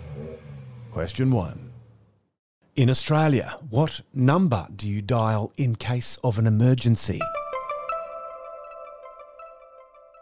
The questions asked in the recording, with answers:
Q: In Australia, what number do you dial in case of an emergency?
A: Triple O.